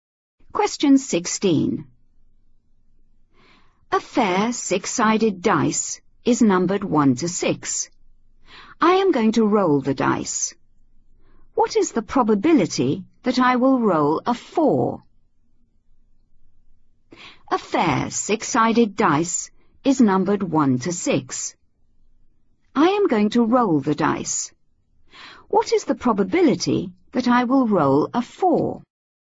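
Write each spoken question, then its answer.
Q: What is the probability that I will roll a 4?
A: 1/6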